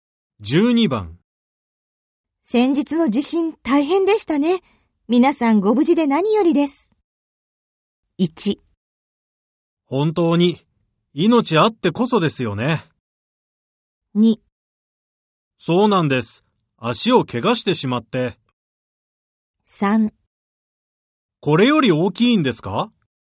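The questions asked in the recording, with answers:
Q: 先日の地震大変でしたね。皆さんご無事で何よりです。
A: 1: 本当に命あってこそですよね。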